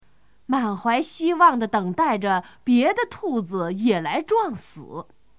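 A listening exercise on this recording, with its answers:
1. 满怀〇〇地等待着别的兔子也来撞死。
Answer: 希望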